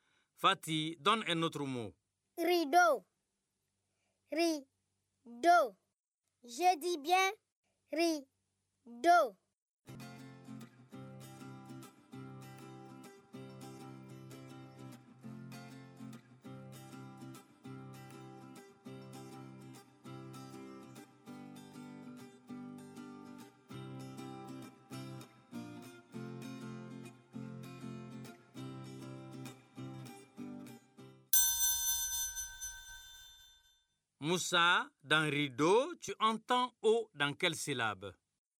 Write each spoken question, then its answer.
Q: Moussa, dans rideau, tu entends O dans quelle syllabe?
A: Dans la deuxième syllabe.